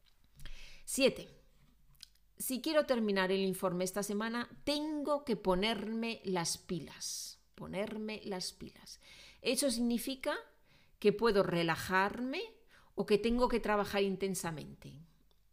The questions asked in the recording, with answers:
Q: Ponerme las pilas. Eso significa que puedo relajarme o que tengo que trabajar intensamente.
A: Bueno, pues eso significa B, ¿no?